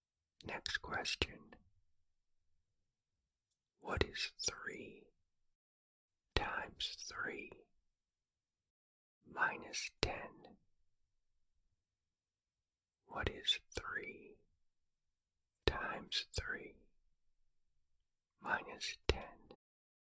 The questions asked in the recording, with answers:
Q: What is 3 times 3 minus 10?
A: The answer is negative 1.